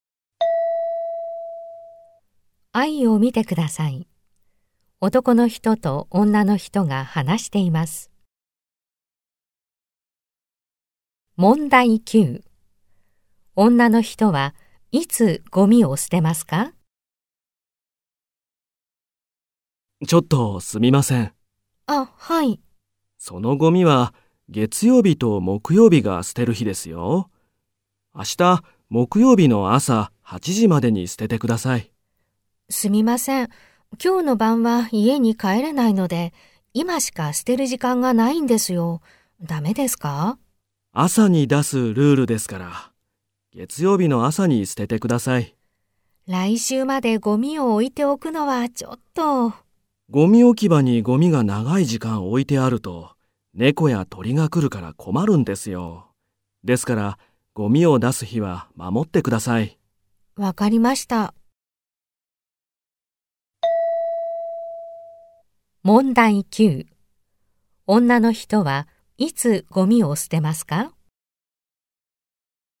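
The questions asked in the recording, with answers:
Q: 女の人はいつゴミを捨てますか?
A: 月曜日の朝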